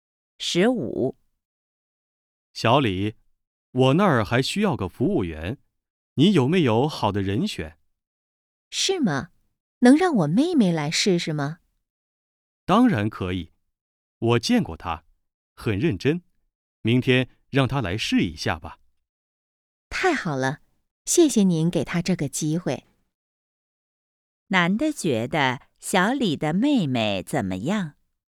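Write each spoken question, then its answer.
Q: 男的觉得小李的妹妹怎么样?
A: 很认真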